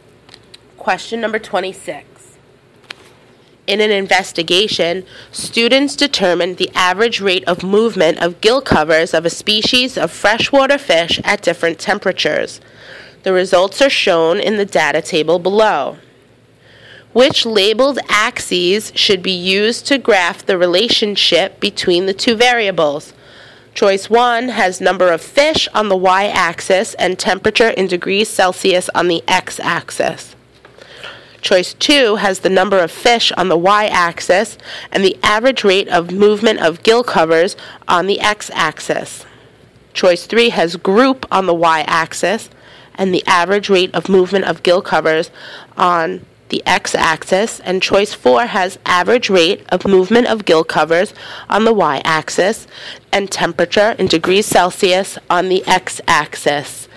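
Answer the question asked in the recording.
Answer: 4: average rate of movement of gill covers on the y-axis and temperature in degrees Celsius on the x-axis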